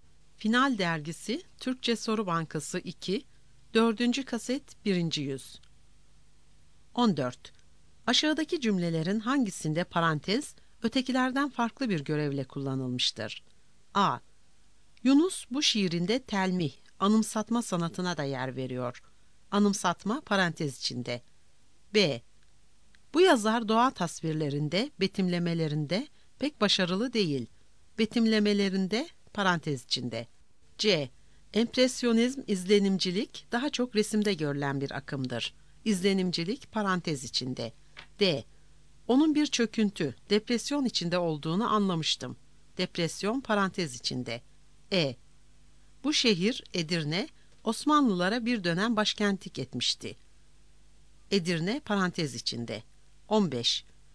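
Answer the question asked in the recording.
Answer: E: Bu şehir Edirne, Osmanlılara bir dönem başkentlik etmişti.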